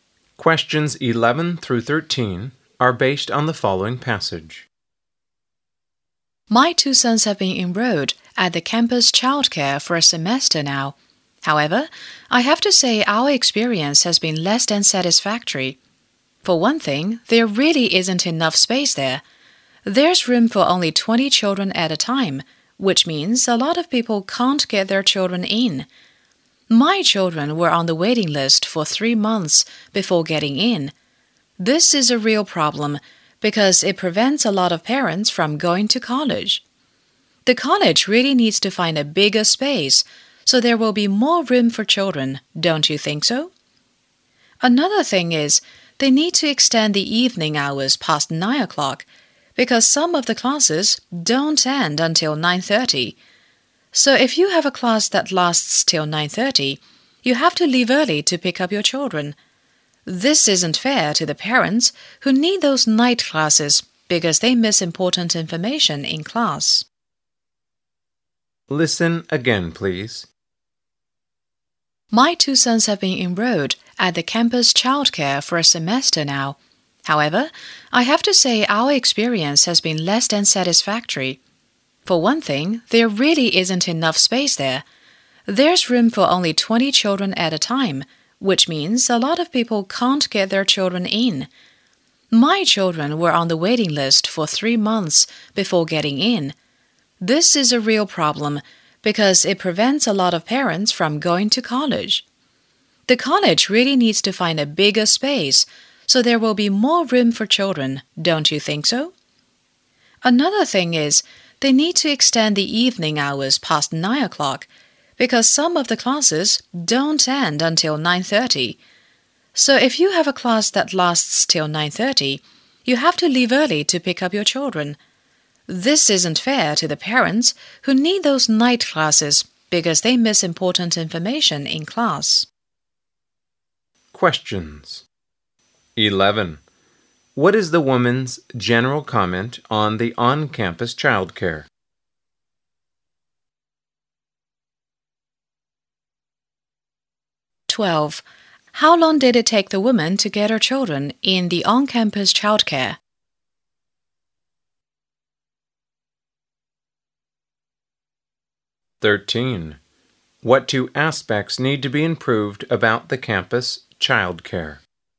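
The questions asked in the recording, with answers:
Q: What is the woman's general comment on the on-campus childcare?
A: It is less than satisfactory.

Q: How long did it take the woman to get her children in the on-campus childcare?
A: 3 months

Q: What two aspects need to be improved about the campus childcare?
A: Space and evening hours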